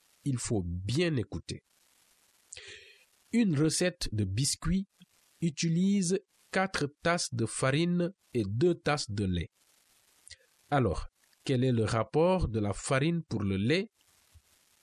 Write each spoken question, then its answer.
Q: Alors, quel est le rapport de la farine pour le lait?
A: Le rapport est de 4 pour 2?